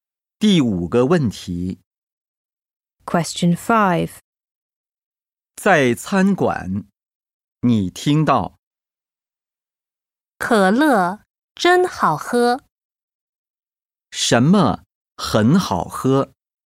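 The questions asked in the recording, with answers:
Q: 什么很好喝?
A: 可乐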